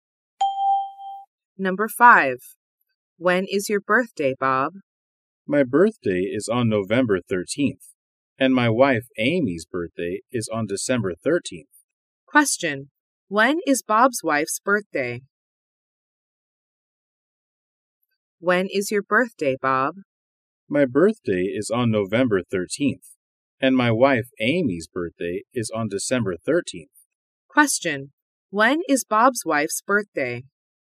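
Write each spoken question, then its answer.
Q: When is Bob's wife's birthday?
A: On December 13th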